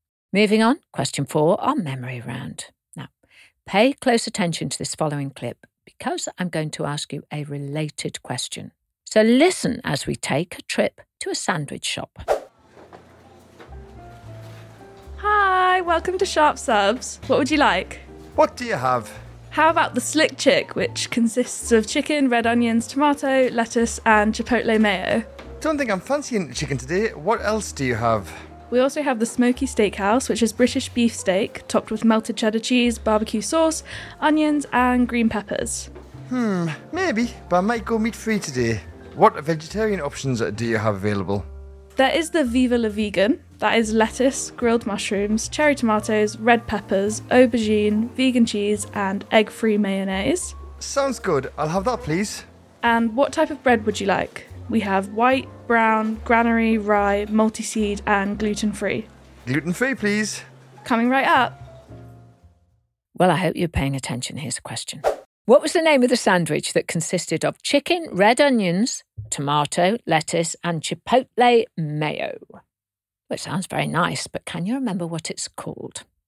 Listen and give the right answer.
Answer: Well, it was called the Slick Chick.